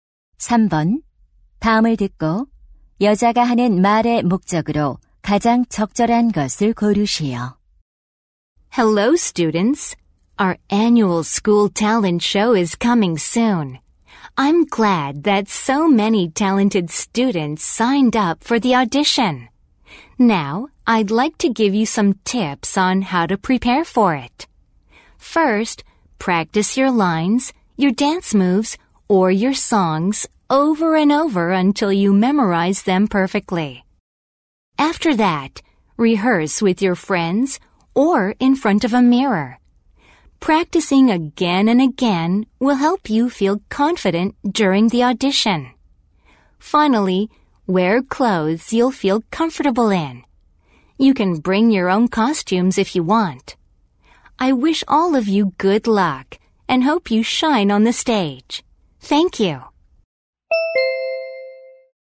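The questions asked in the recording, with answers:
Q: 다음을 듣고 여자가 하는 말의 목적으로 가장 적절한 것을 고르시오.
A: 학예회 오디션 준비 요령을 알려 주려고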